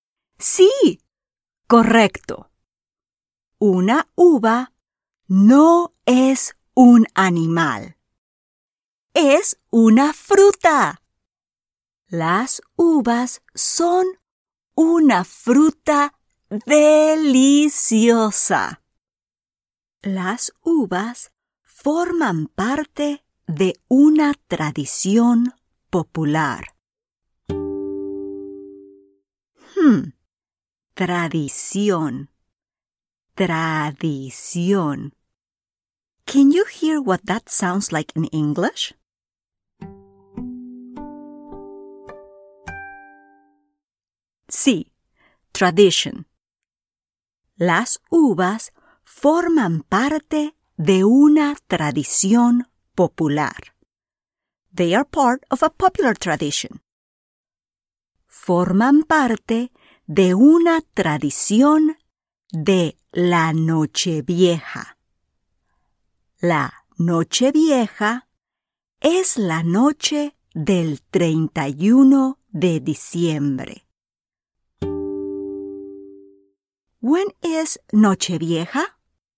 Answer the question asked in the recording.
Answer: Sí, el 31 de diciembre. December 31